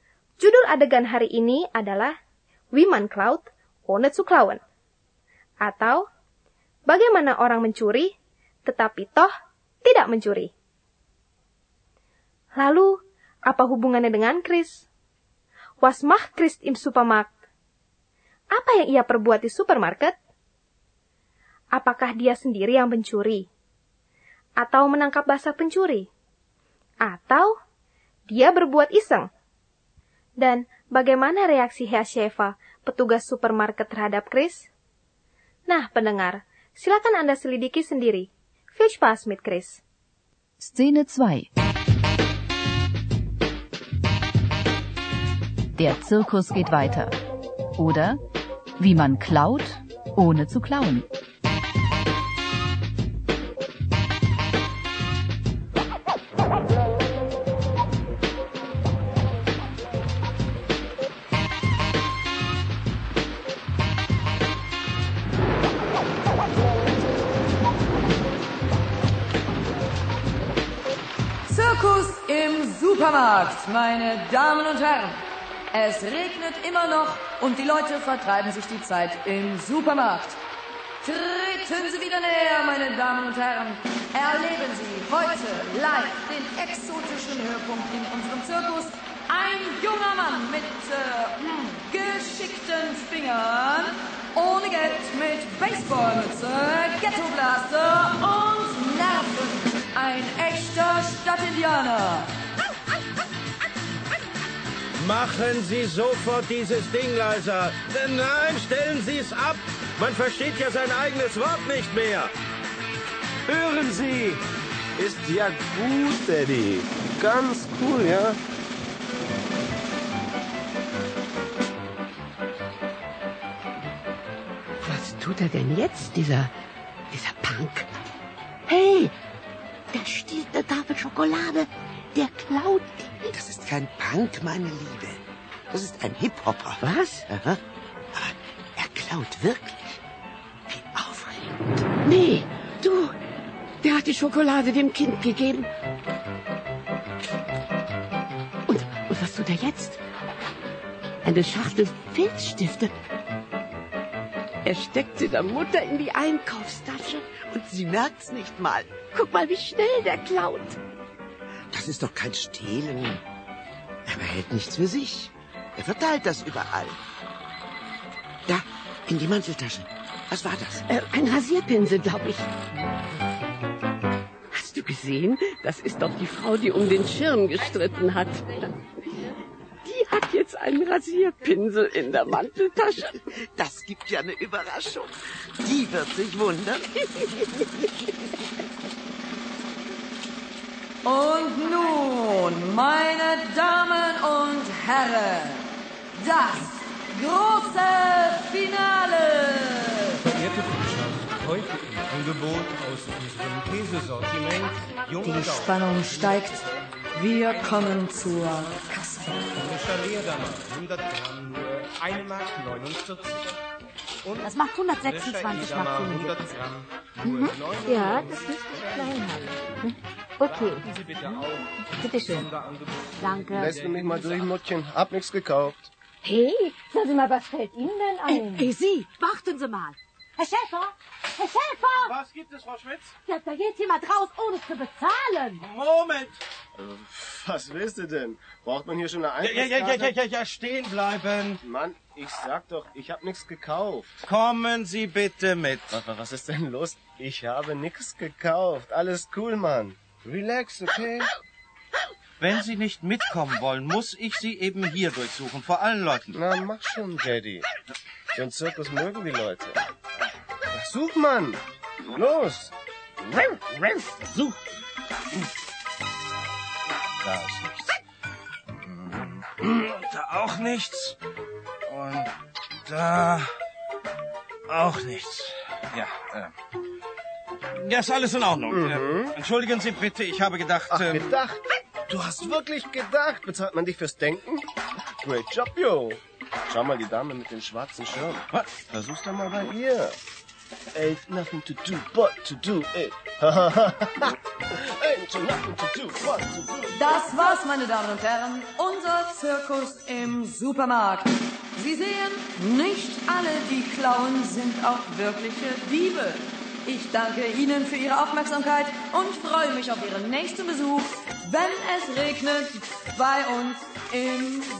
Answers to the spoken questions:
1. Chris dengan tenang tapi cekatan mengambil barang-barang dari dalam rak dan menyelipkannya ke kantong atau tas orang lain.
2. Lalu Hiasheva memeriksanya, dan apa yang dia temukan? Ternyata tidak satupun barang. Akhirnya Hiasheva harus minta maaf.